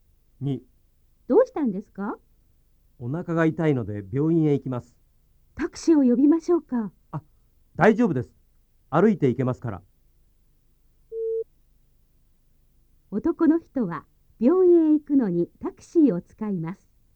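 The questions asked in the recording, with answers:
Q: 男の人は病院へ行くのにタクシーを使います。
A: ×(歩いて行きます)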